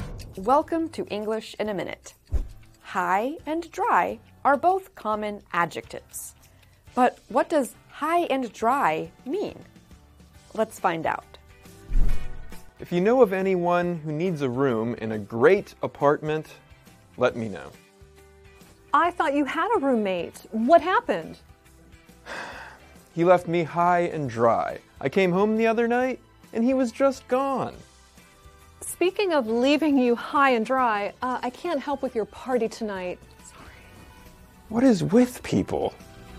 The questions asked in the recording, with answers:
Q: But what does high and dry mean?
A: High and dry means to leave someone in a tough situation or to make life difficult for them.